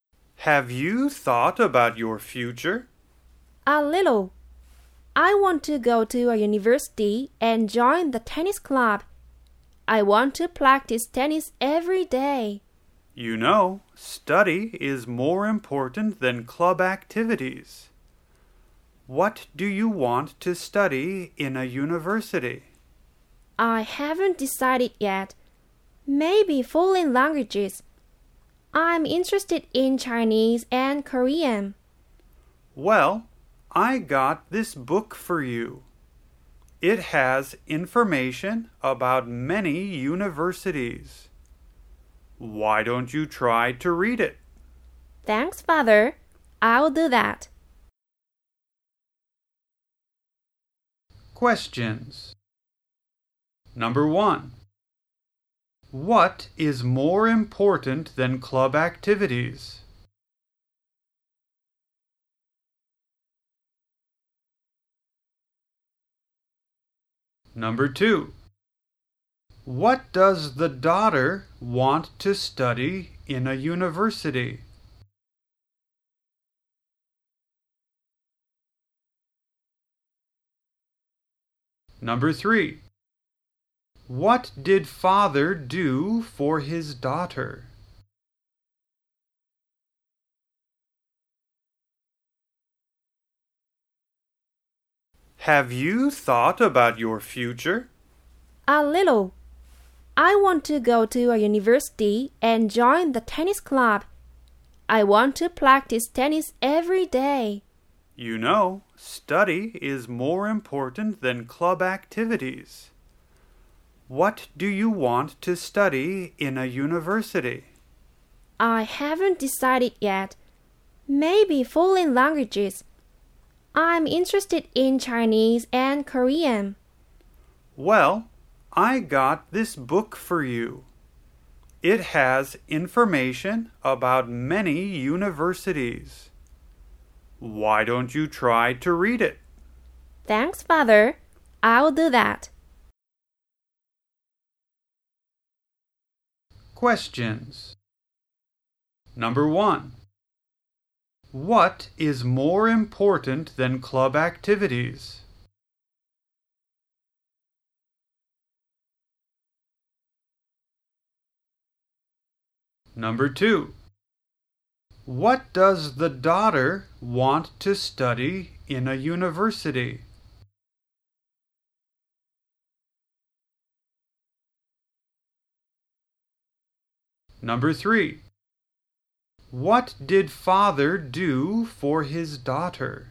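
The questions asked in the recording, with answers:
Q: What is more important than club activities?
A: Study

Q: What does the daughter want to study in a university?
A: Foreign languages, such as Chinese and Korean

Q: What did father do for his daughter?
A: He got her a book with information about many universities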